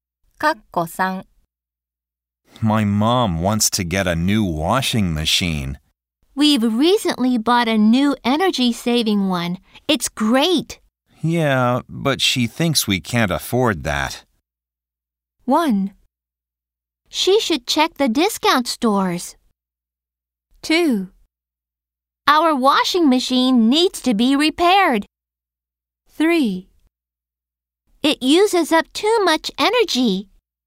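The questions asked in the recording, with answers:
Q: Yeah, but she thinks we can't afford that.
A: 1: She should check the discount stores.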